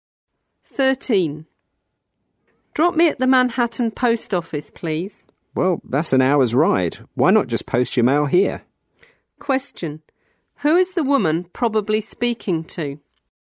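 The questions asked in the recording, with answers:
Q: Who is the woman probably speaking to?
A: A taxi driver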